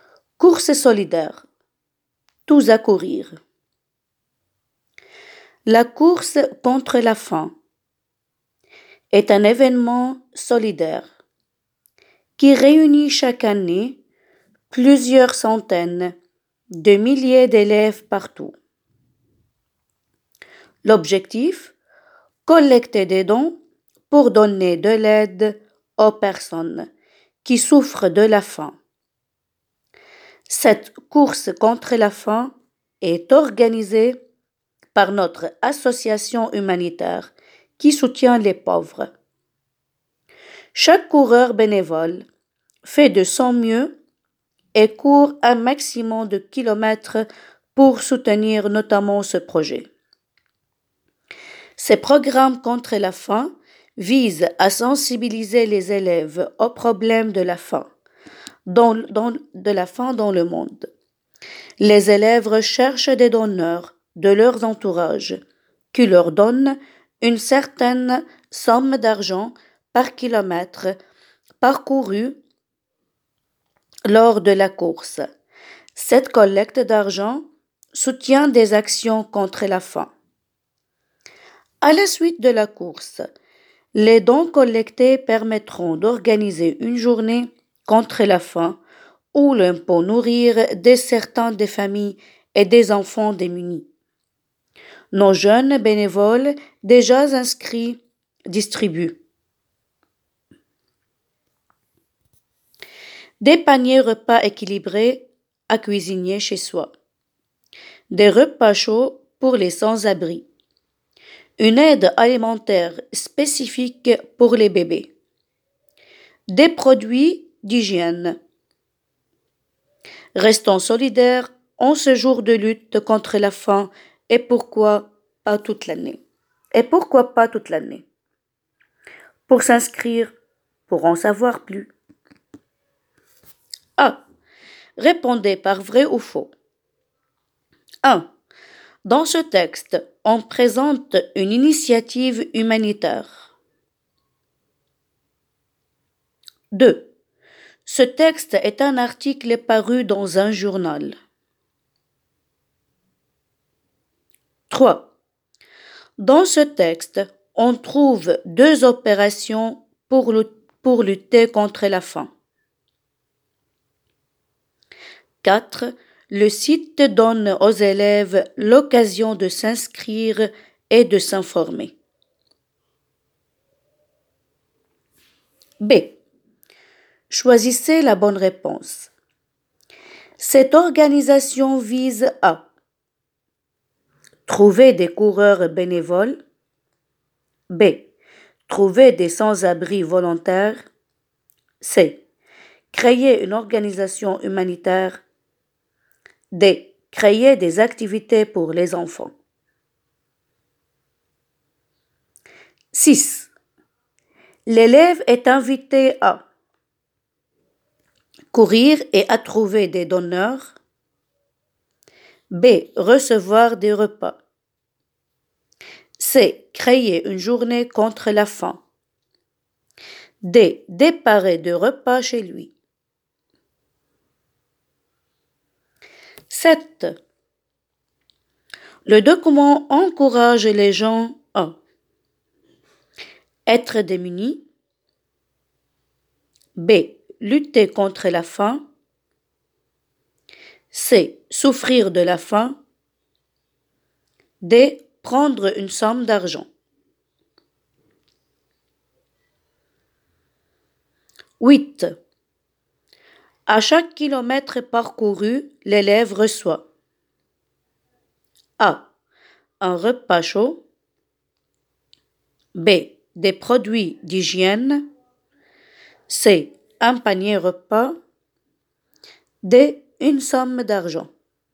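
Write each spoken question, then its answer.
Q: Dans ce texte, on présente une initiative humanitaire.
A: Vrai

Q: Ce texte est un article paru dans un journal.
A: Faux

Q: Le site donne aux élèves l'occasion de s'inscrire et de s'informer.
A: Vrai

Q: Cette organisation vise à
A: A: trouver des coureurs bénévoles

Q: L'élève est invité à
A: A: courir et à trouver des donneurs

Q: Le document encourage les gens à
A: B: Lutter contre la faim

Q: À chaque kilomètre parcouru, l'élève reçoit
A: D: Une somme d'argent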